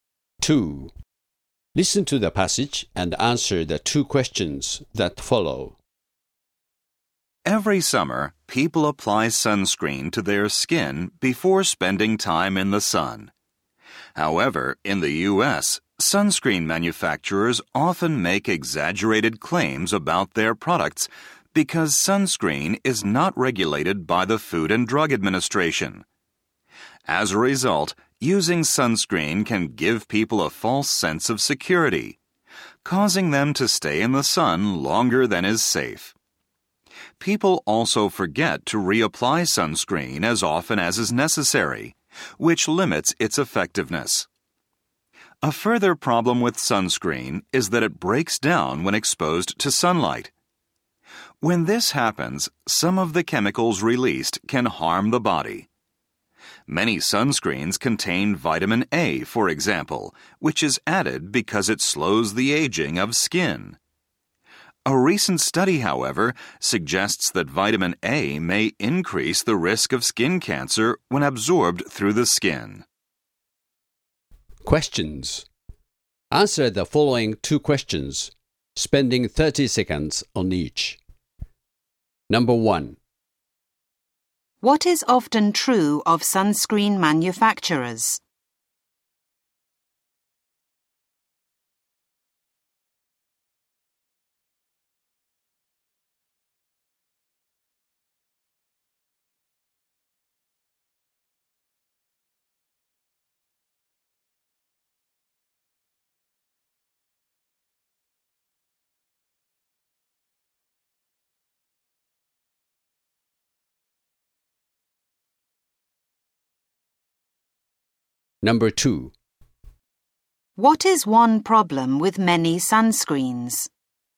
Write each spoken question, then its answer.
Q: What is often true of sunscreen manufacturers?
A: Sunscreen manufacturers often overestimate the effectiveness of their products while remaining silent on some of their negative side effects.

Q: What is one problem with many sunscreens?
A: Sunscreens can break down over time, releasing chemicals which may be physically harmful.